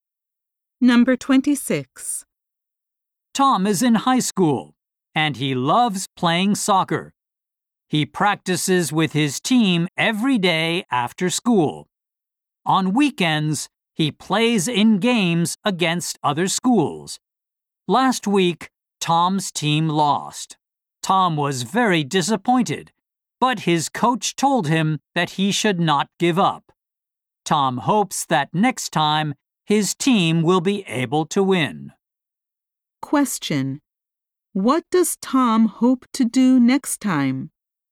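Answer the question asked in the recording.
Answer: Win the game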